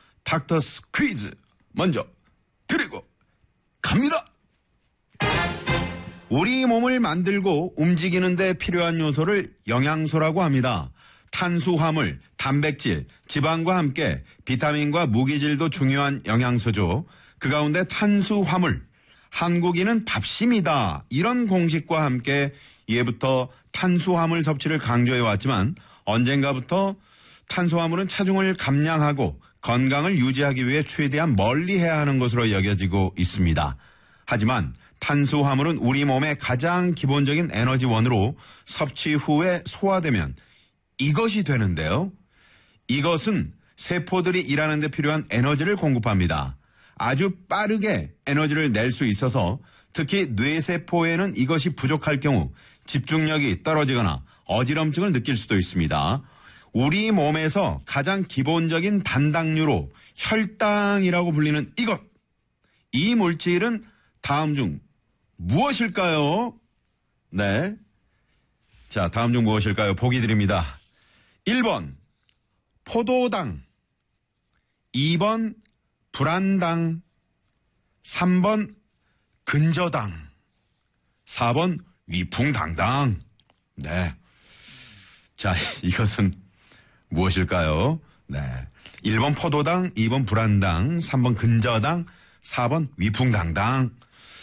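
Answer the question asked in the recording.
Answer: 1번: 포도당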